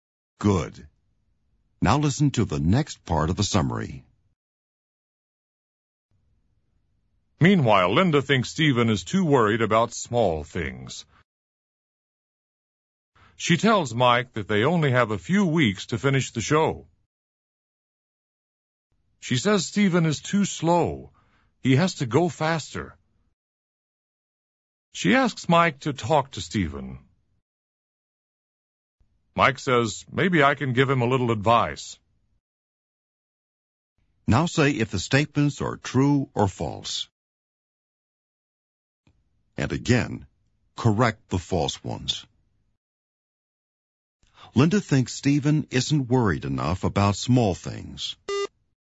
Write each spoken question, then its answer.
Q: Linda thinks Stephen isn't worried enough about small things.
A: False. She thinks he is too worried about small things.